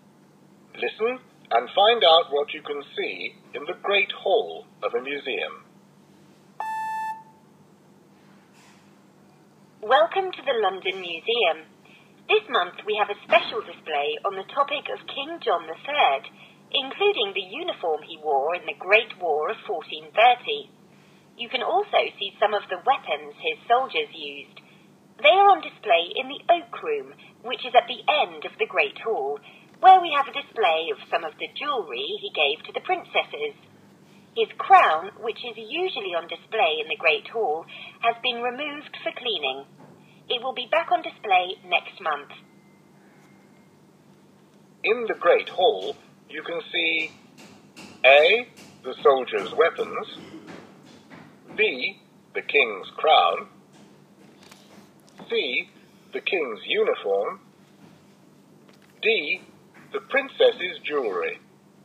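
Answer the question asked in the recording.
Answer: D: the princess's jewellery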